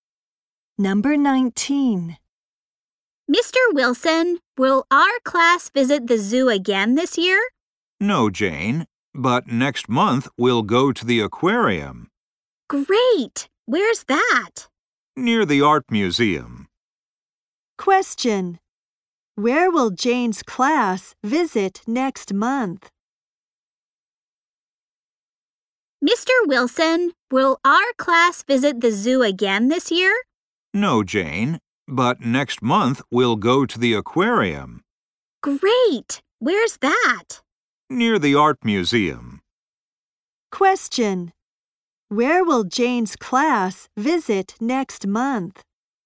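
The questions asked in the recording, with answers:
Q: Where will Jane's class visit next month?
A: The aquarium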